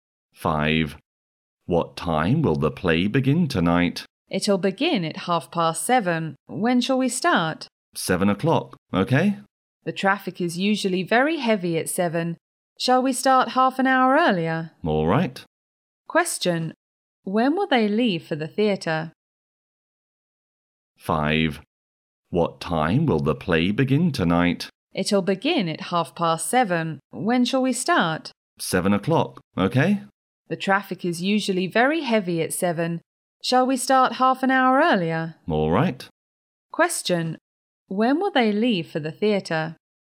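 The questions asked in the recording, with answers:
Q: When will they leave for the theatre?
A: At 6:30.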